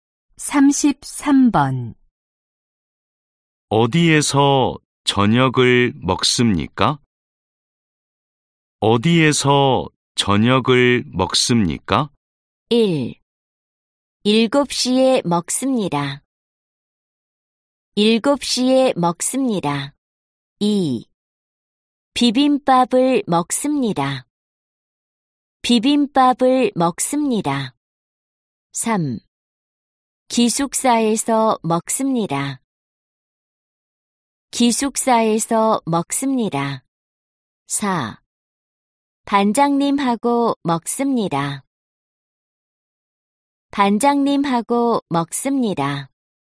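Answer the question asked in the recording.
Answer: 3: 기숙사에서 먹습니다.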